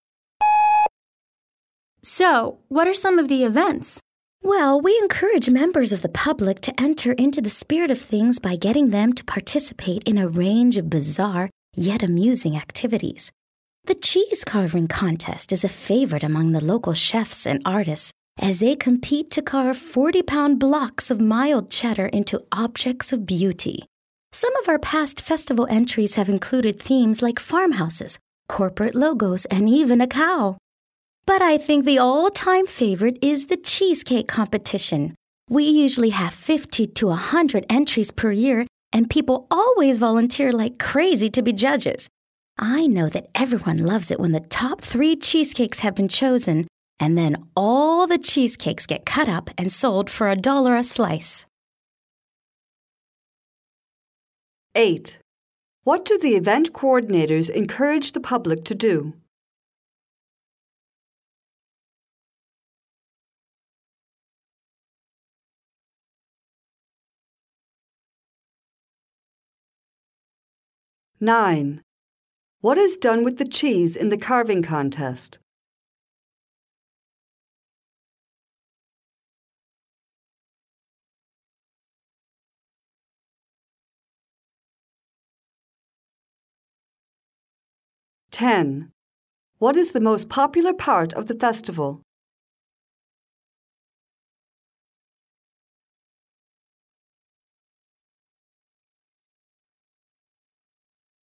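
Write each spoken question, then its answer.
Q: What do the event coordinators encourage the public to do?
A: Take part in bizarre but amusing activities

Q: What is done with the cheese in the carving contest?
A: 40-pound blocks of cheddar are carved into objects of beauty

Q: What is the most popular part of the festival?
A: The cheesecake competition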